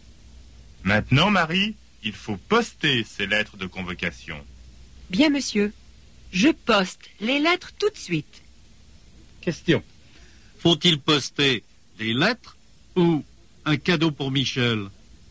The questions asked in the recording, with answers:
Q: Question. Faut-il poster des lettres? Ou un cadeau pour Michel?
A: Il faut poster des lettres.